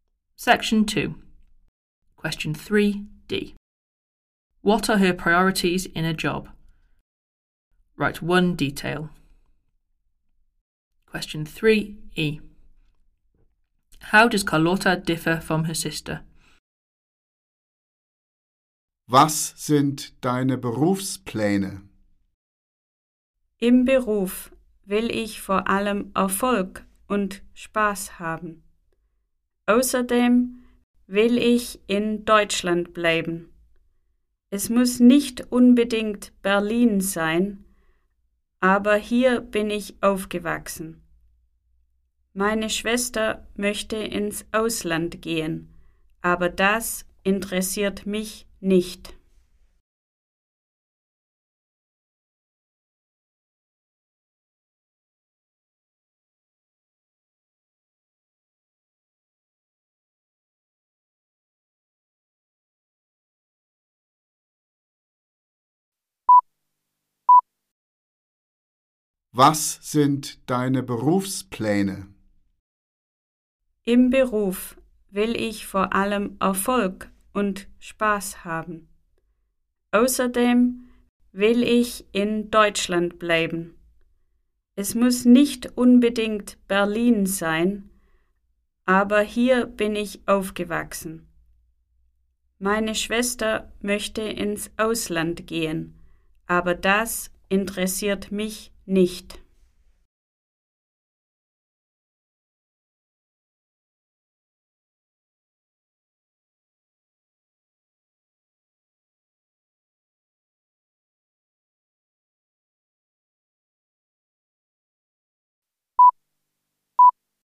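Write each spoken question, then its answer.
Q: What are her priorities in a job?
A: Success and fun

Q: How does Carlotta differ from her sister?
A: Her sister wants to go abroad; Carlotta wants to stay in Germany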